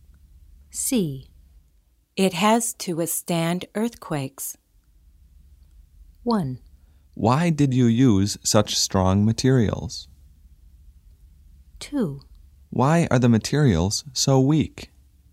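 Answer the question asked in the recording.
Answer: 1: Why did you use such strong materials?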